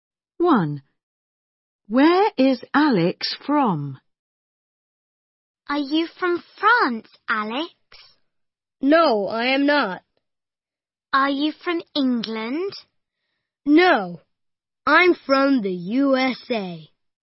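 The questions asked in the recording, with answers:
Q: Where is Alex from?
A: the USA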